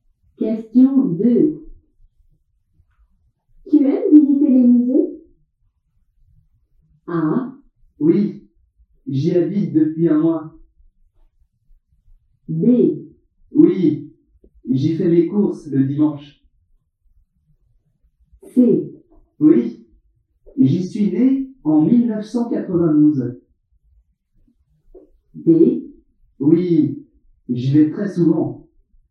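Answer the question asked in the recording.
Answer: D: Oui, j'y vais très souvent.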